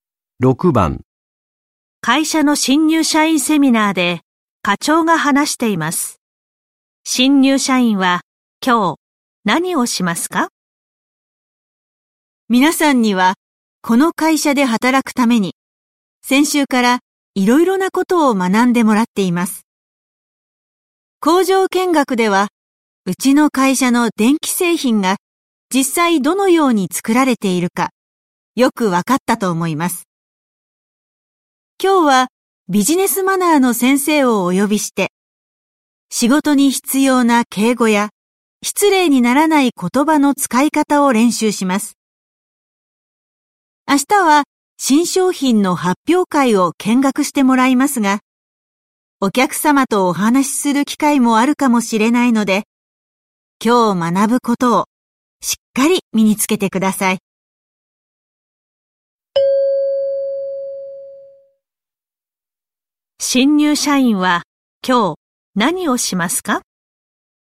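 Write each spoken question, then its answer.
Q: 新入社員は今日何をしますか?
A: 敬語や言葉の使い方を練習する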